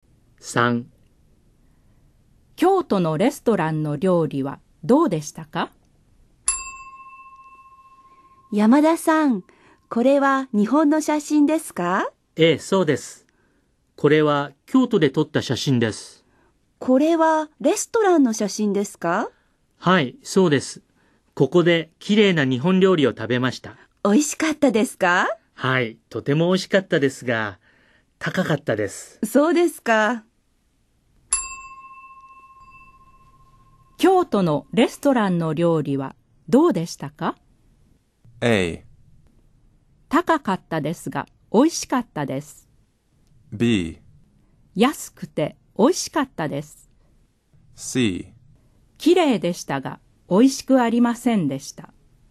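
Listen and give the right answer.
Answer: A: 高かったですが、美味しかったです。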